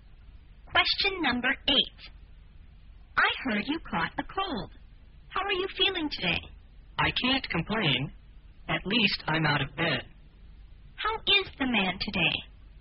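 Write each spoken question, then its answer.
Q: How is the man today?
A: He is getting better; he's out of bed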